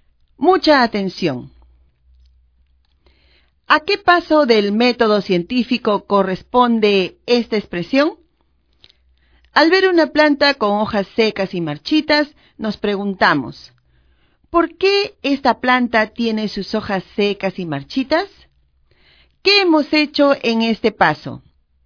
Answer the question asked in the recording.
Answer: Muy bien, hemos observado la planta.